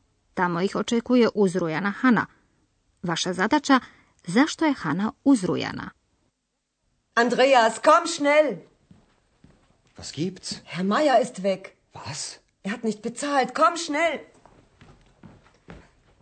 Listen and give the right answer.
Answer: Vjerojatno ste odgonetnuli da je Hana uzrujana, jer je nestao gospodin Majer.